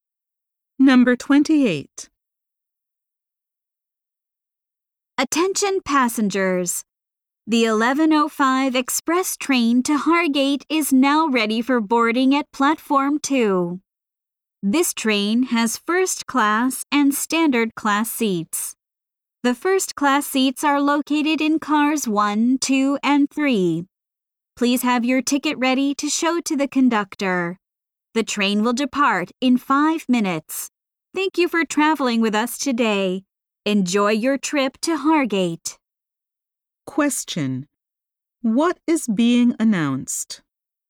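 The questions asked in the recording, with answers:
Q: What is being announced?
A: The express train to Hargate is ready for boarding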